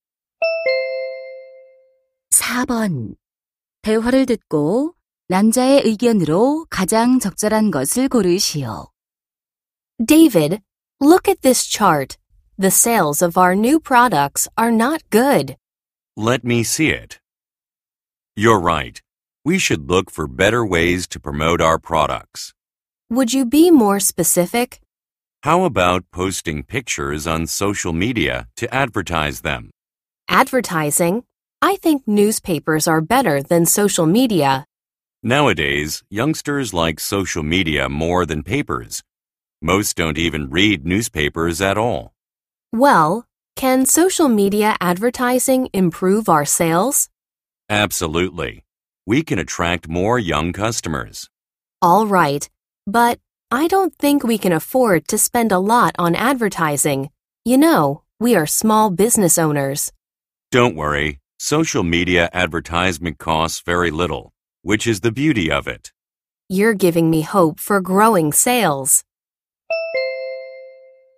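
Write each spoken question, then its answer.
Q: 대화를 듣고 남자의 의견으로 가장 적절한 것을 고르시오.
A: 소셜 미디어 광고가 저렴하고 판매 증진에 효과적이다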